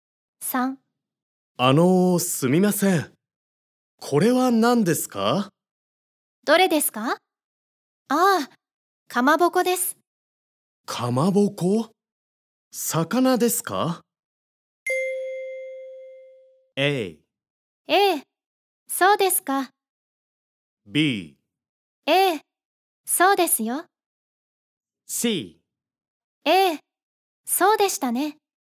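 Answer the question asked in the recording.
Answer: B: A、そうですよ。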